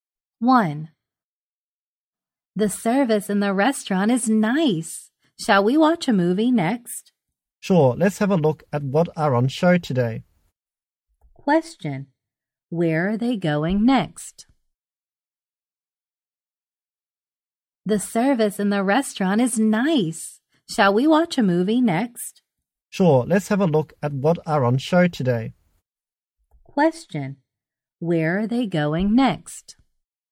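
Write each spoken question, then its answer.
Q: Where are they going next?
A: To the cinema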